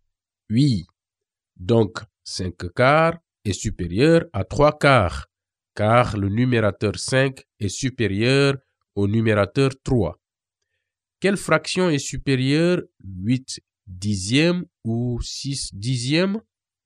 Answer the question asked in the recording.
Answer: 8 dixièmes est supérieur à 6 dixièmes car le numérateur 8 est supérieur au numérateur 6.